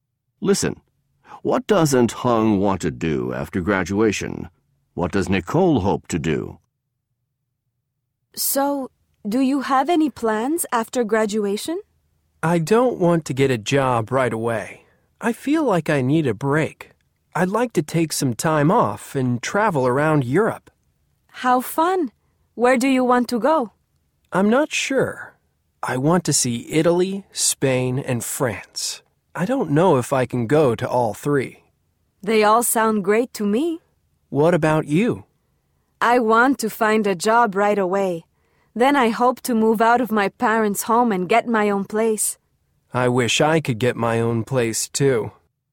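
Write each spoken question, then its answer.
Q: What doesn't Hung want to do after graduation?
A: Get a job right away

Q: What does Nicole hope to do?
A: Find a job right away, then move out of her parents' home and get her own place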